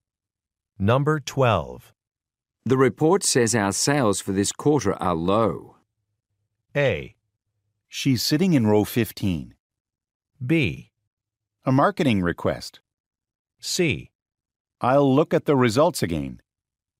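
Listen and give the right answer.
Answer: C: I'll look at the results again.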